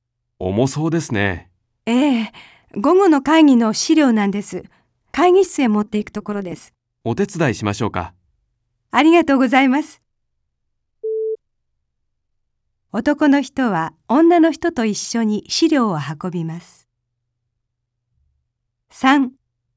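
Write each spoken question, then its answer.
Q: 男の人は女の人と一緒に資料を運びます。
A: ○(正しい)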